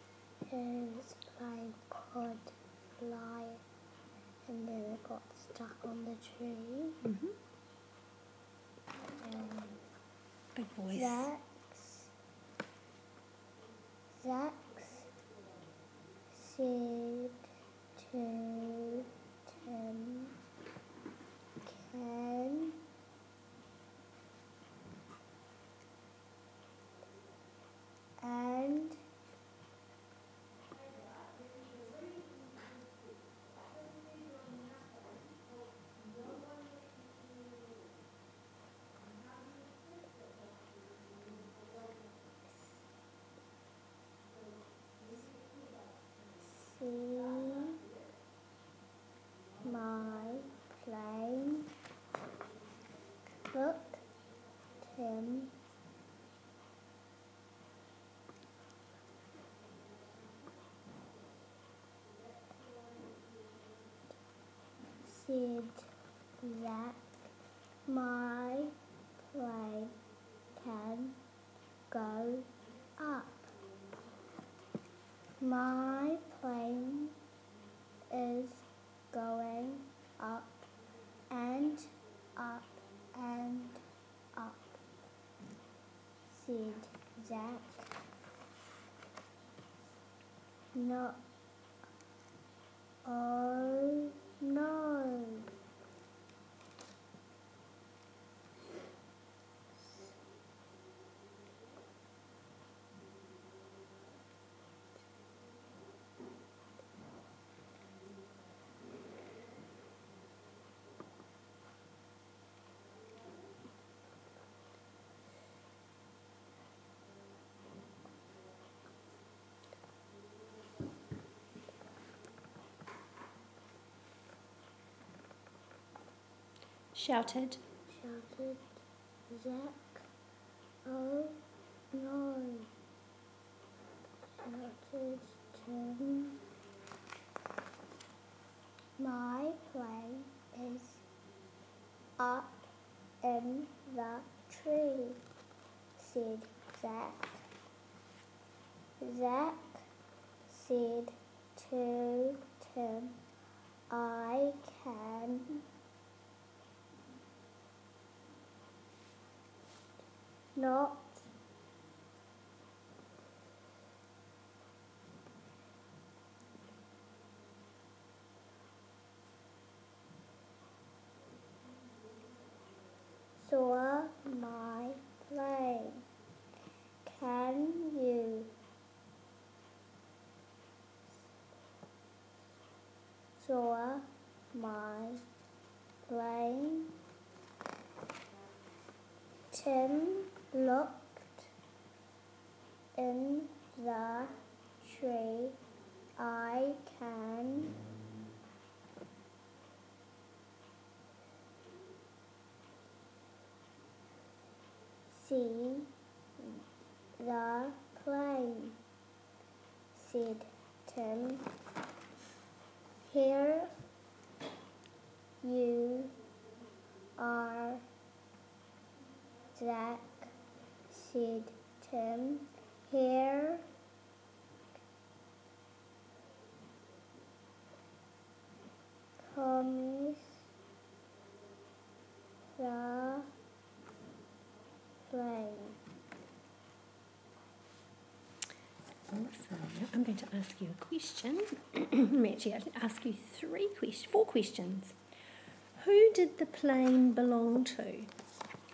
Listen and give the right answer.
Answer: Zach.